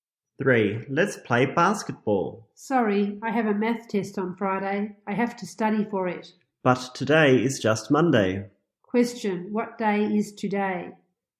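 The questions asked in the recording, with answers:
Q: Question, what day is today?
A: Monday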